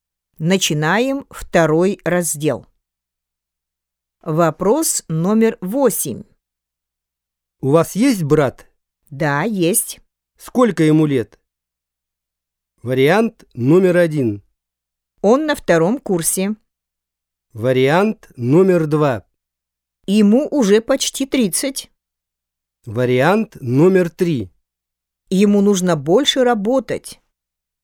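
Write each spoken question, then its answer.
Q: Сколько ему лет?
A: 2: Ему уже почти 30.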